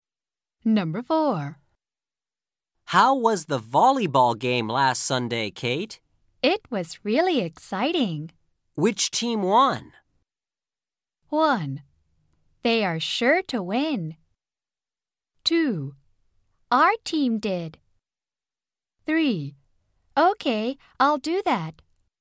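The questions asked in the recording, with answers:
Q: Which team won?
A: 2: Our team did.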